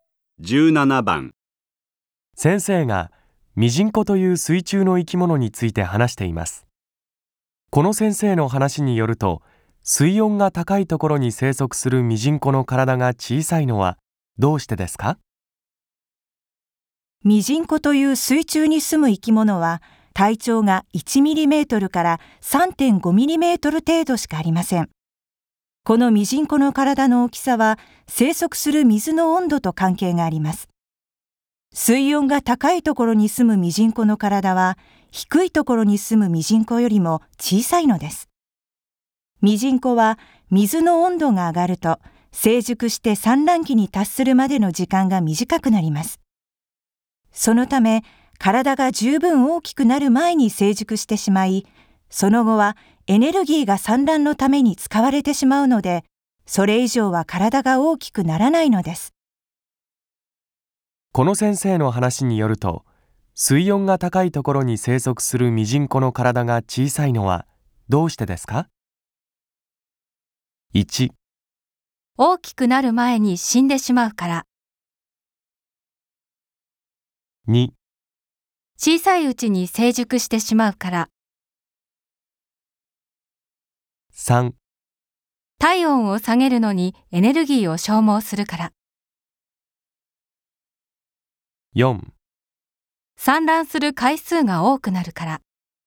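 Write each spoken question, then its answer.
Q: この先生の話によると、水温が高いところに生息するミジンコの体が小さいのはどうしてですか?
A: 2: 小さいうちに成熟してしまうから。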